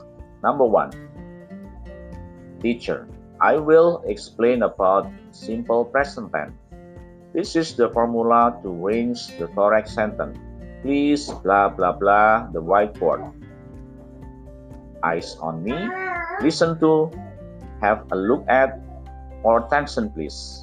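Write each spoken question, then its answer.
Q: Number one, teacher, I will explain about simple present tense. This is the formula to arrange the correct sentence. Please, blah, blah, blah, the whiteboard. Eyes on me. Listen to, have a look at, or attention please.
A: have a look at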